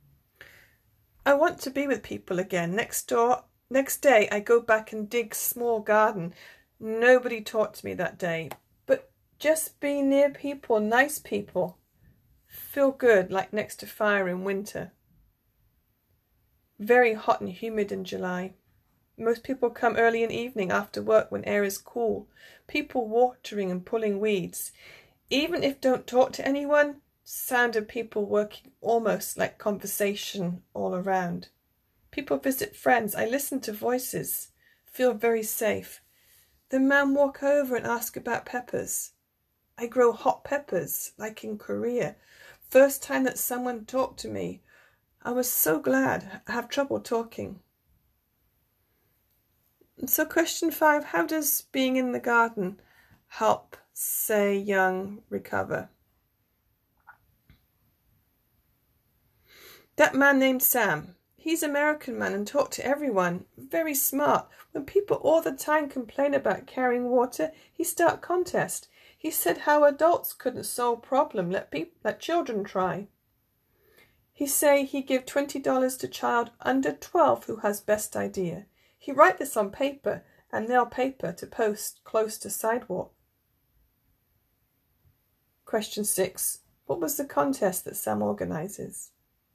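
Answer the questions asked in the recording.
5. Being near nice people makes her feel safe and good, and someone talks to her
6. $20 to the child under 12 with the best idea for getting water to the garden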